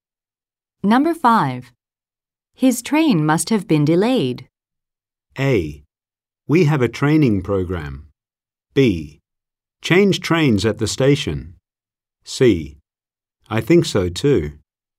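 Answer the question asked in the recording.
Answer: C: I think so too.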